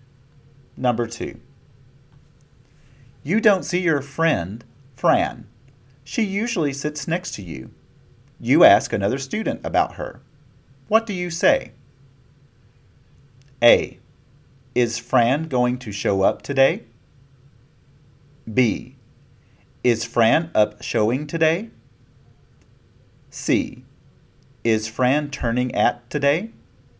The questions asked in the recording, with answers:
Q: What do you say?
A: The correct answer is A. Is Fran going to show up today?